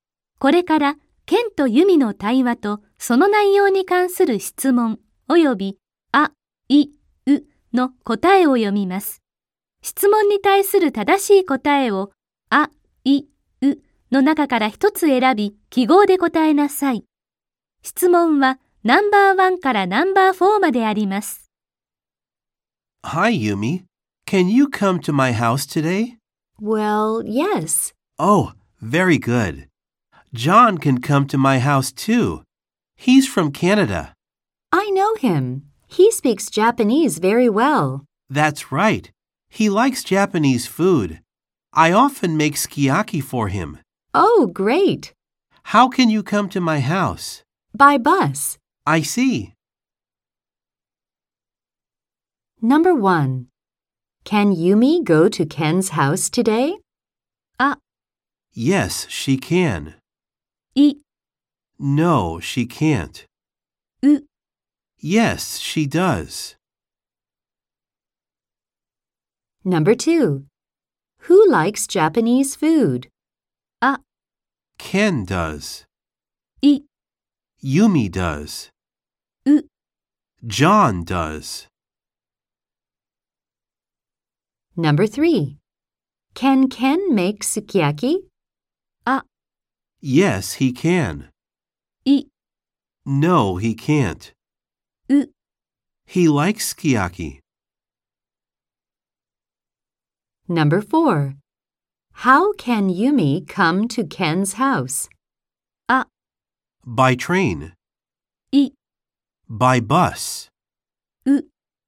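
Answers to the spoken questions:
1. あ: Yes, she can.
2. う: John does.
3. あ: Yes, he can.
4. い: By bus.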